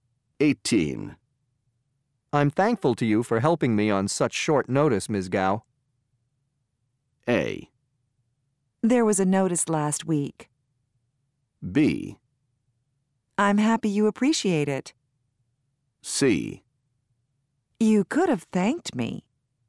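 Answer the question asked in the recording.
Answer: B: I'm happy you appreciate it.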